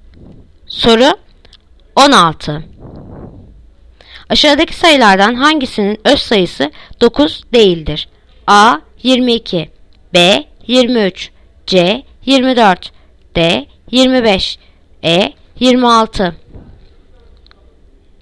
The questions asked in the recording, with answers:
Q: Aşağıdaki sayılardan hangisinin öz sayısı 9 değildir?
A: Yanıt Adana 22.